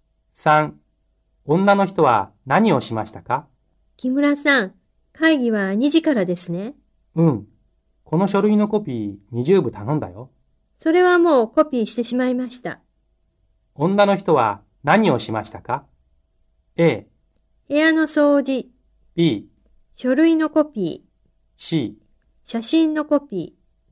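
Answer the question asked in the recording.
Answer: B: 書類のコピー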